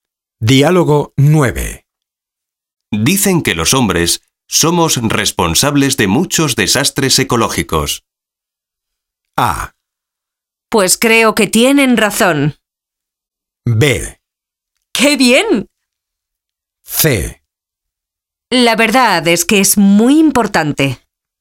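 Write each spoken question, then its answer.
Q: Dicen que los hombres somos responsables de muchos desastres ecológicos.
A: A: Pues creo que tienen razón.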